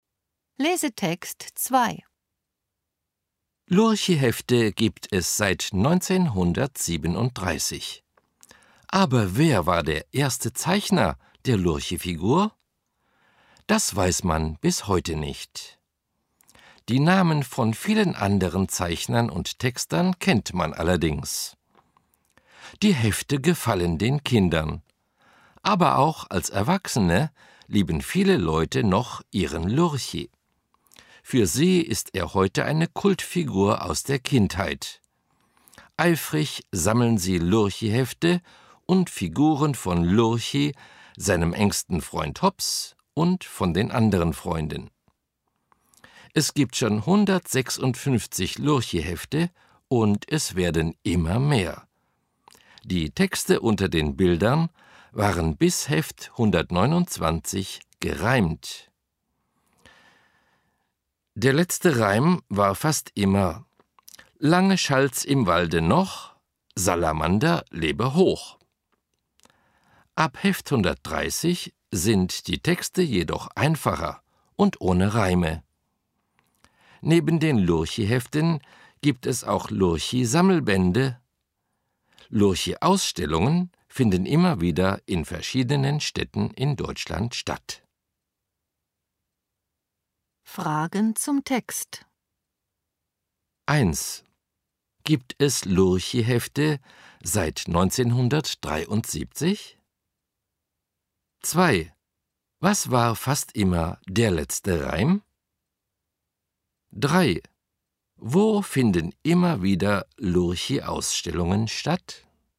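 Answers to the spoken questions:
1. Nein, seit 1937.
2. Lange schallt's im Walde noch, Salamander lebe hoch.
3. In verschiedenen Städten in Deutschland.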